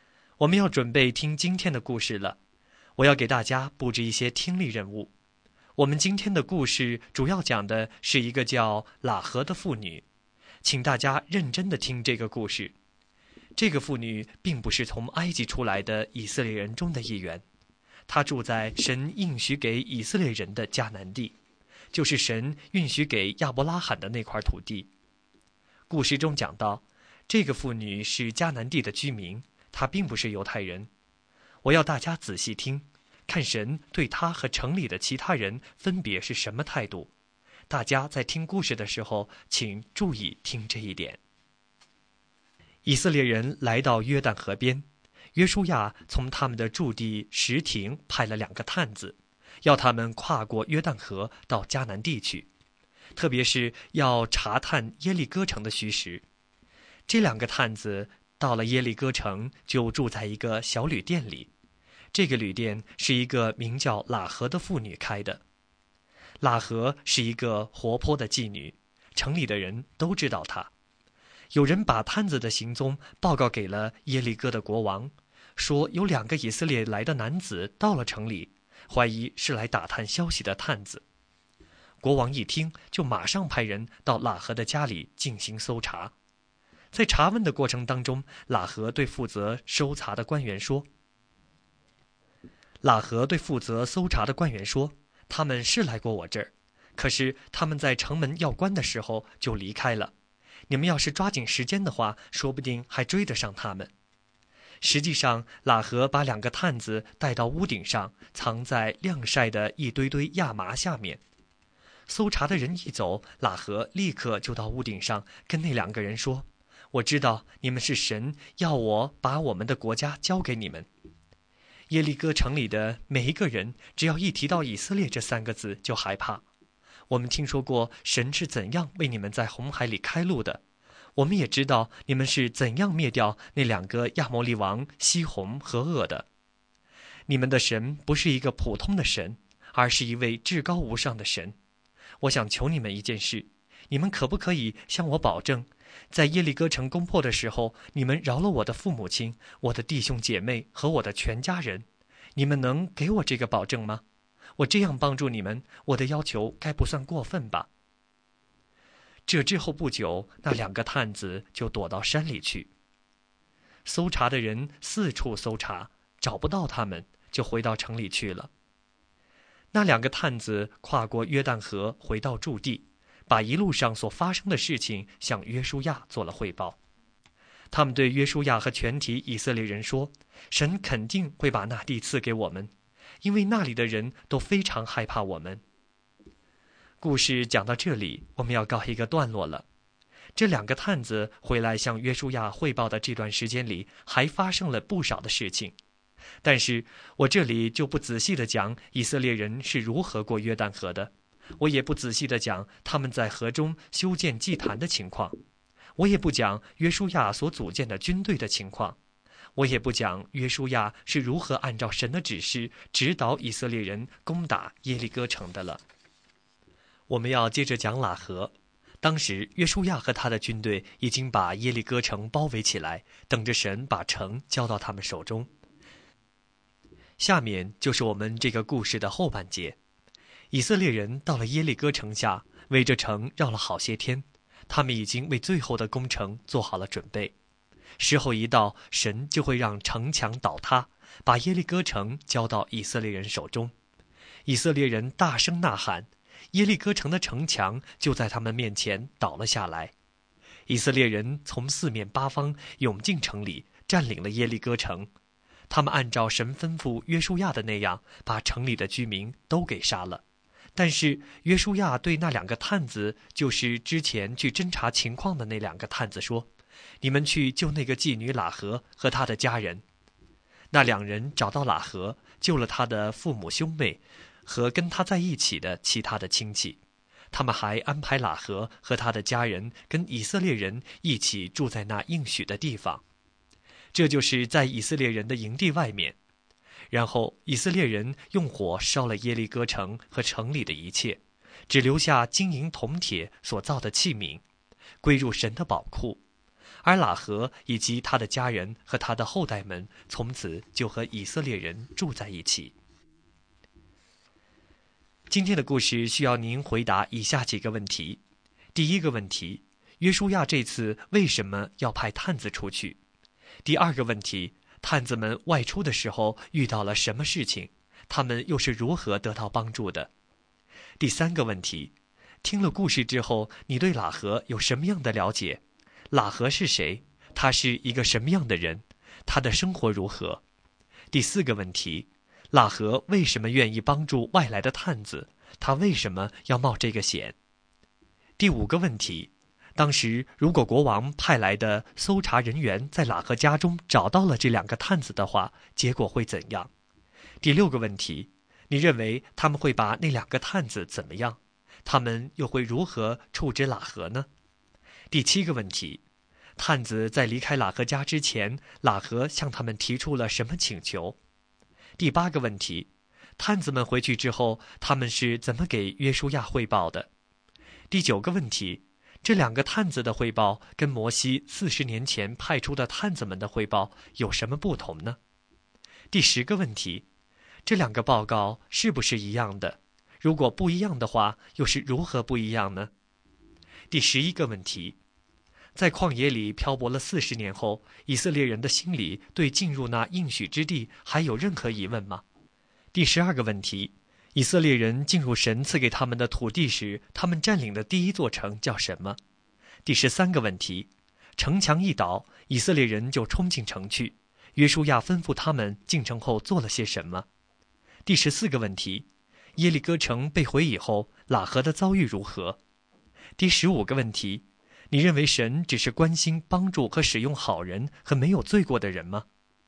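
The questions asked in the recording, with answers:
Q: 约书亚这次为什么要派探子出去?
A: 去迦南地查探耶利哥城的虚实

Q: 探子们外出的时候遇到了什么事情?他们又是如何得到帮助的?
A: 有人向耶利哥王告发了他们,王派人搜查;喇合把他们藏在屋顶的亚麻下面,还骗搜查的人说他们已经走了

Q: 听了故事之后,你对喇合有什么样的了解?喇合是谁?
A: 她是住在耶利哥城的迦南妇女,是妓女,开了一家小旅店

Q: 探子在离开喇合家之前,喇合向他们提出了什么请求?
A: 保证攻破耶利哥城的时候饶了她的父母、弟兄姐妹和全家人

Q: 探子们回去之后,他们是怎么给约书亚汇报的?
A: 神肯定会把那地赐给我们,因为那里的人都非常害怕我们

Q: 以色列人进入神赐给他们的土地时,他们占领的第一座城叫什么?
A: 耶利哥城

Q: 城墙一倒,以色列人就冲进城去,约书亚吩咐他们进城后做了些什么?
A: 杀了城里的居民,但救出喇合和她的家人,并用火烧了城,把金银铜铁器皿归入神的宝库

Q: 耶利哥城被毁以后,喇合的遭遇如何?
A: 她和家人都得救了,从此和以色列人住在一起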